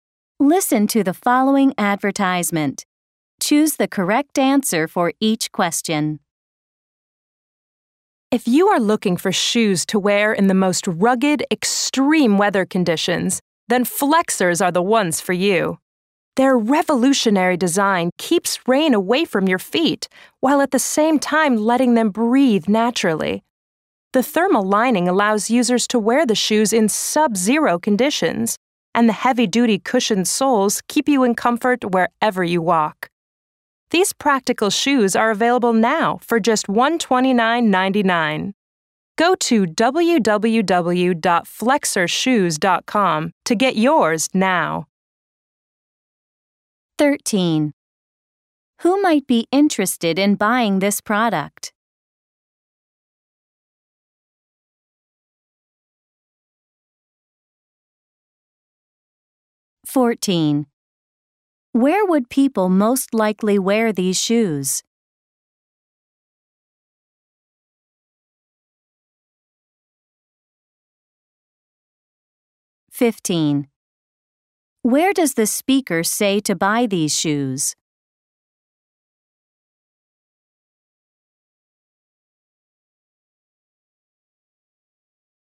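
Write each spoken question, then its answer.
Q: Where does the speaker say to buy these shoes?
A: Online at www.flexershoes.com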